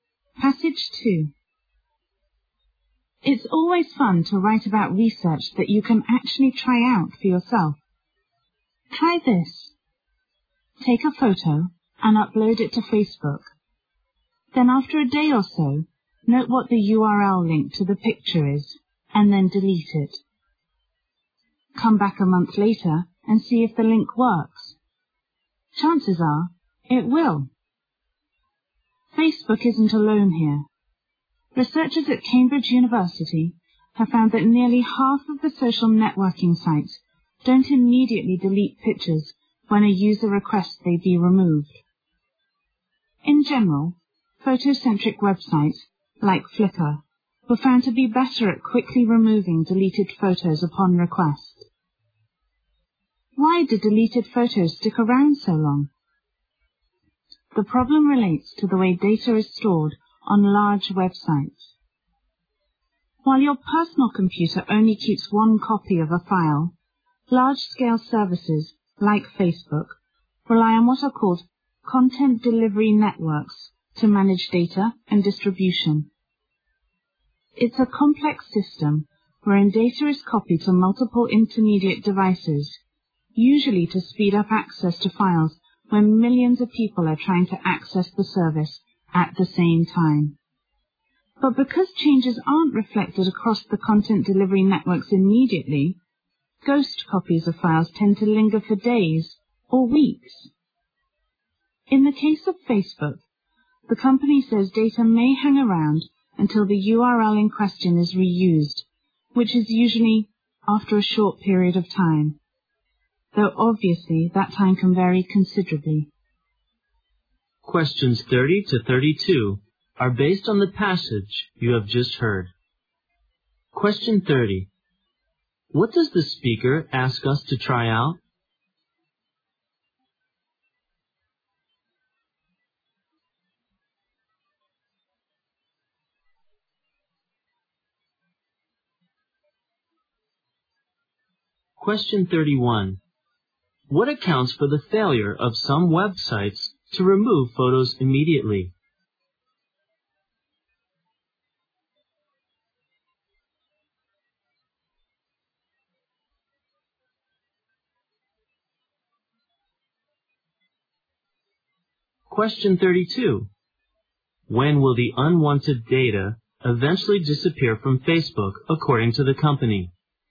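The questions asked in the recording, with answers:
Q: What does the speaker ask us to try out?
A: Upload a photo to Facebook, delete it, and see if its link still works a month later.

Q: What accounts for the failure of some websites to remove photos immediately?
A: The way large websites store data across content delivery networks.

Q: When will the unwanted data eventually disappear from Facebook, according to the company?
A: When the URL is reused.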